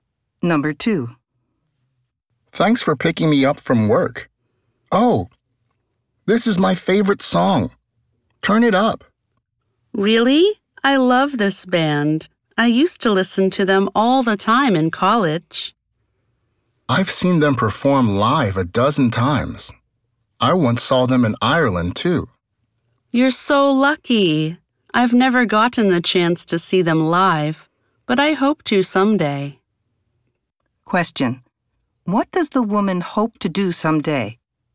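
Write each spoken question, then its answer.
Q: What does the woman hope to do someday?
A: See the band perform live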